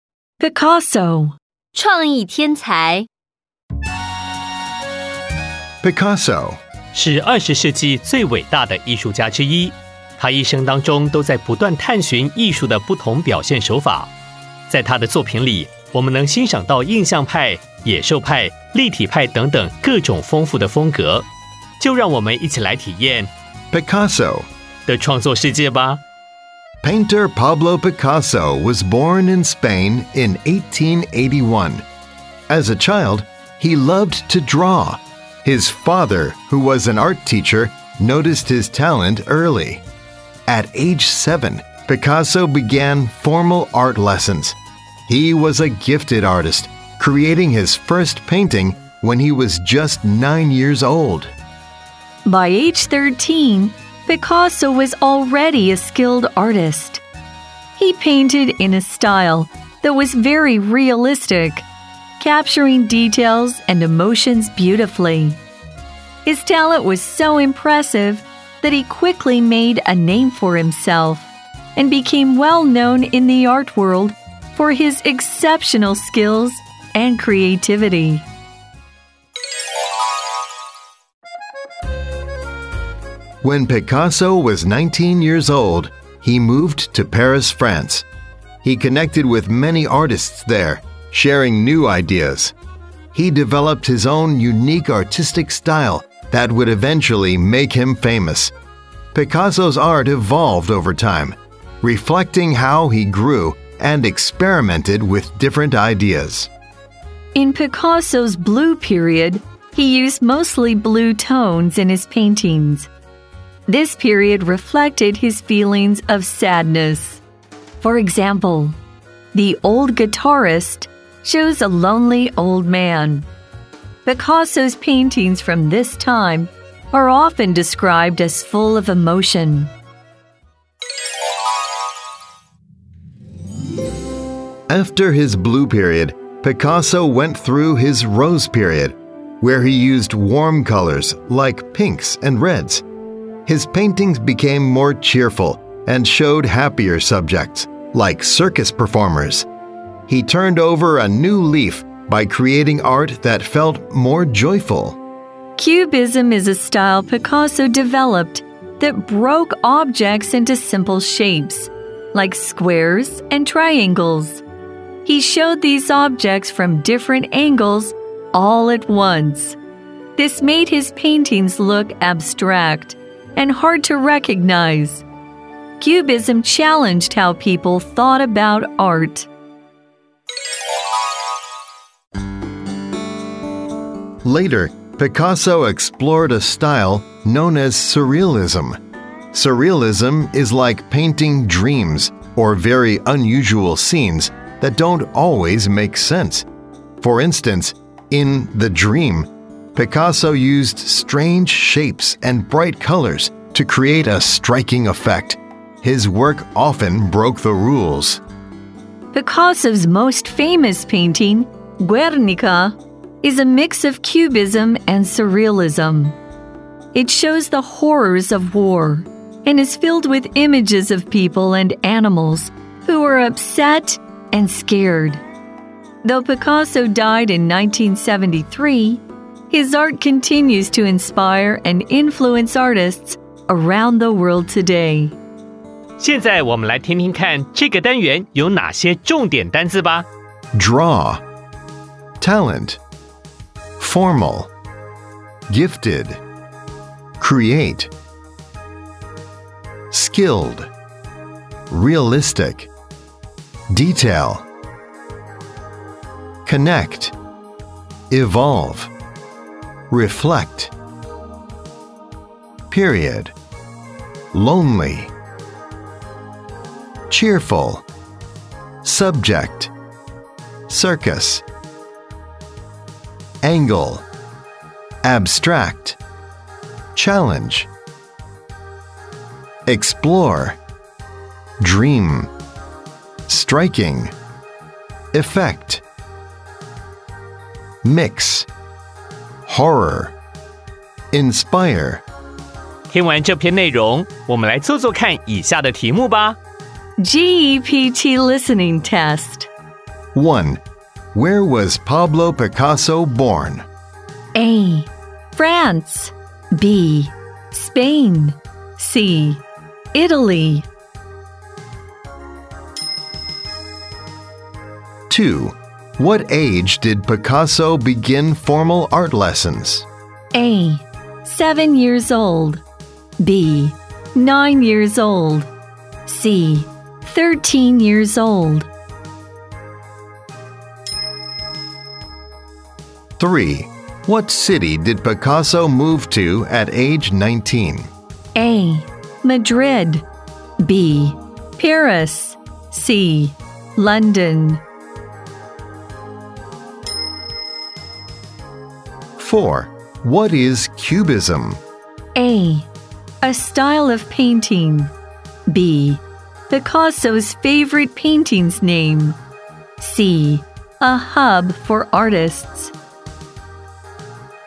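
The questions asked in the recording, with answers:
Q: Where was Pablo Picasso born?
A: B: Spain.

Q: What age did Picasso begin formal art lessons?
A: A: 7 years old.

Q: What city did Picasso move to at age 19?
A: B: Paris.

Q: What is Cubism?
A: A: A style of painting.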